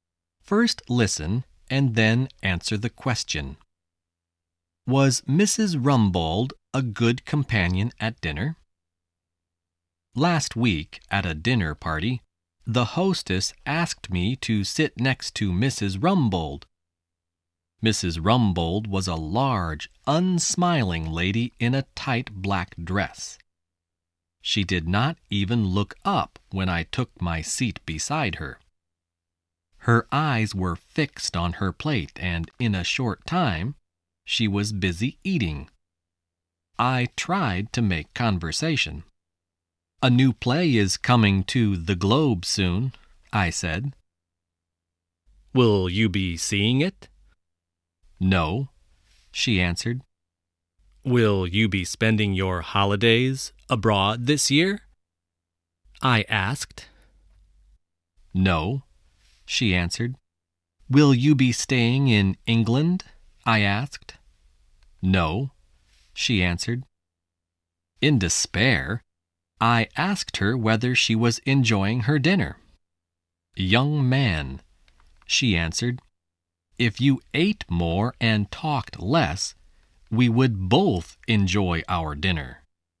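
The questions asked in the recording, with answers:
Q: Was Mrs. Rumbold a good companion at dinner?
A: No, she only wanted to eat and did not want to talk.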